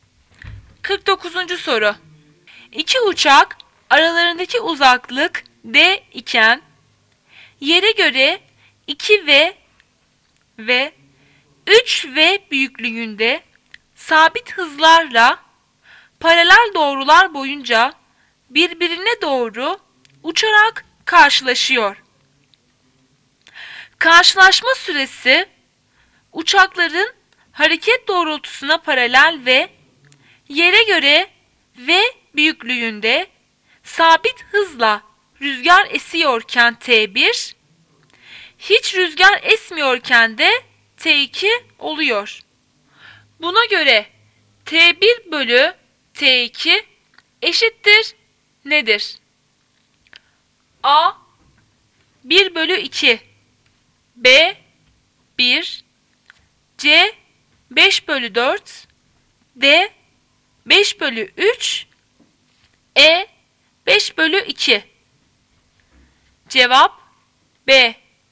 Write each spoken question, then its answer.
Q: Buna göre T1 bölü T2 eşittir nedir?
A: Cevap B.